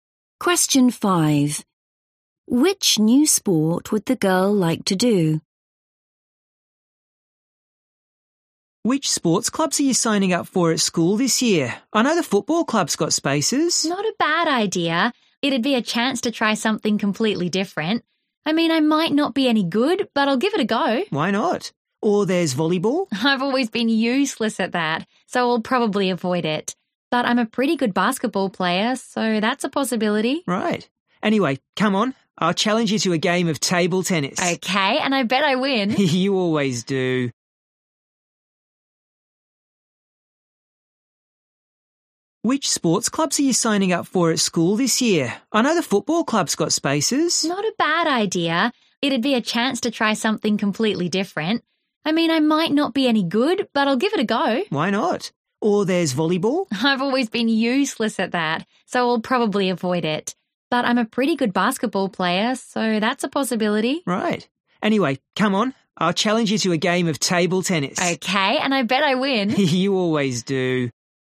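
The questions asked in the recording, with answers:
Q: Which new sport would the girl like to do?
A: football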